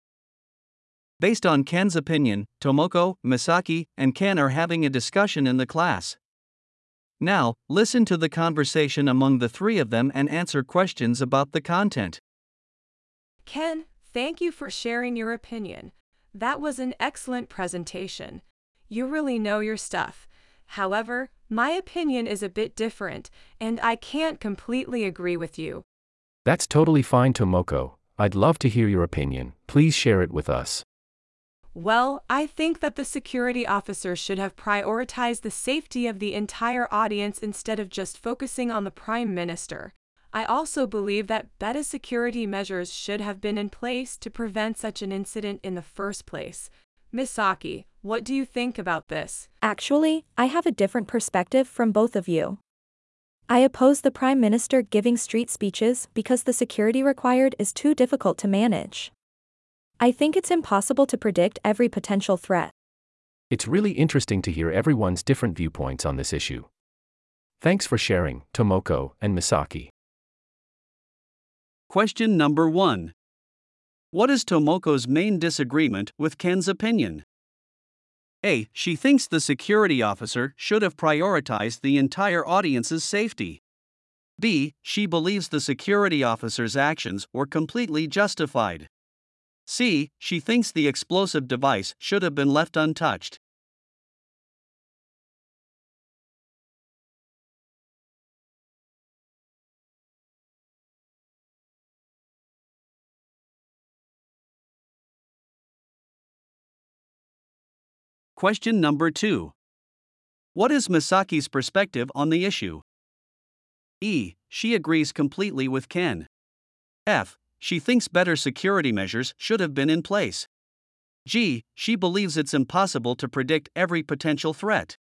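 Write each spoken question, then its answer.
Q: What is Tomoko's main disagreement with Ken's opinion?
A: A: She thinks the security officer should have prioritized the entire audience's safety.

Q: What is Misaki's perspective on the issue?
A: G: She believes it's impossible to predict every potential threat.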